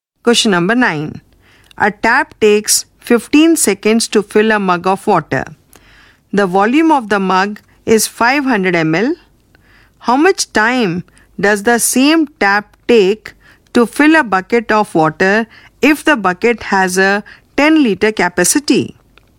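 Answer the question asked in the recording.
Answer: 300 seconds (5 minutes)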